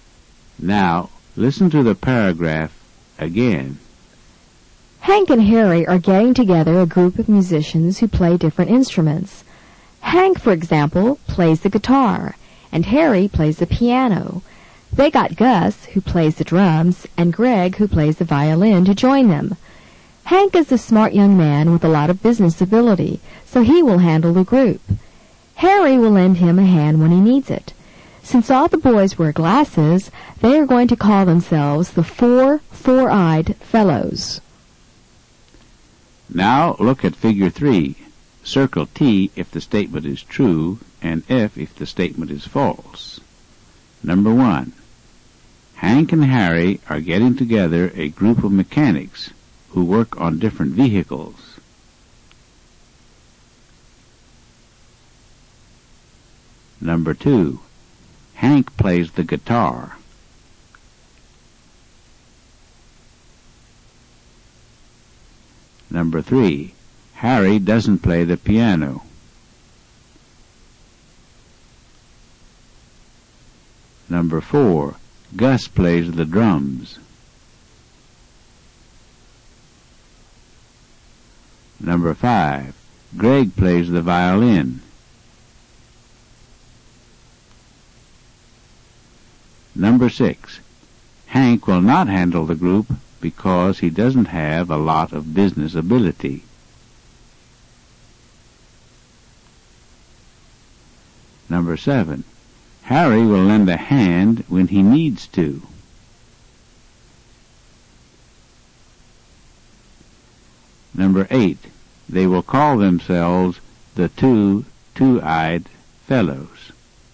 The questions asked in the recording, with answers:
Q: Hank and Harry are getting together a group of mechanics who work on different vehicles.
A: Number 1 is false. Hank and Harry are getting together a group of musicians, not mechanics.

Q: Hank plays the guitar.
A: Number 2 is true. Hank plays the guitar.

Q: Harry doesn't play the piano.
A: Number 3 is false. Harry plays the piano.

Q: Gus plays the drums.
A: Number 4 is true. Gus plays the drums.

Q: Greg plays the violin.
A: Number 5 is true. Greg plays the violin.

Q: Hank will not handle the group because he doesn't have a lot of business ability.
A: Number 6 is false. Hank has a lot of business ability.

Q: Harry will lend a hand when he needs to.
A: Number 7 is true. Harry will lend a hand when he needs to.

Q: They will call themselves the two-eyed fellows.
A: And number 8 is false. They will call themselves the four-eyed fellows, not the two-eyed fellows.